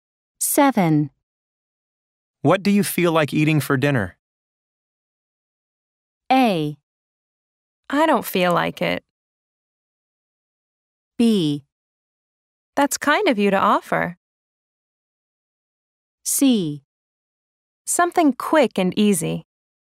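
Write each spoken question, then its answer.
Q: What do you feel like eating for dinner?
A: C: Something quick and easy.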